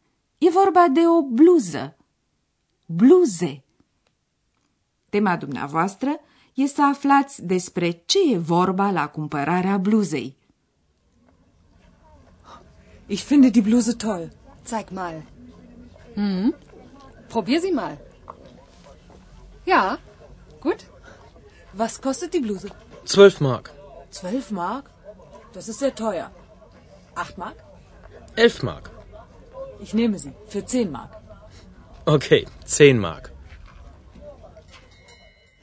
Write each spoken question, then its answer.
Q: Tema dumneavoastră e să aflați despre ce e vorba la cumpărarea bluzei.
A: E o scenă tipică de talcioc.